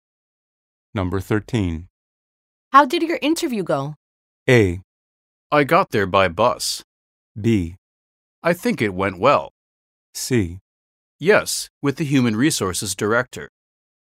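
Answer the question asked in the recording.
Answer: B: I think it went well.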